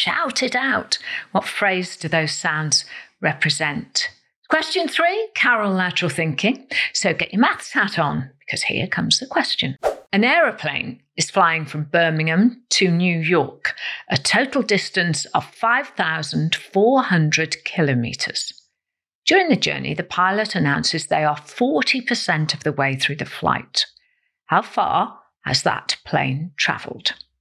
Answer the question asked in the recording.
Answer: The answer is 2,160 kilometres.